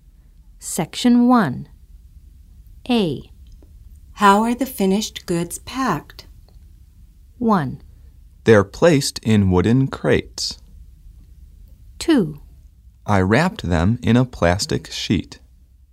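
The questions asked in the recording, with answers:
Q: How are the finished goods packed?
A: 1: They're placed in wooden crates.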